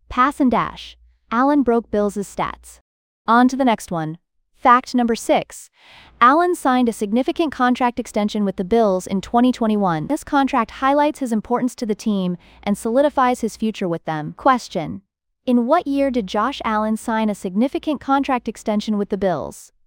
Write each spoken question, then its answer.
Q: in what year did Josh Allen sign a significant contract extension with the Bills?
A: 2021.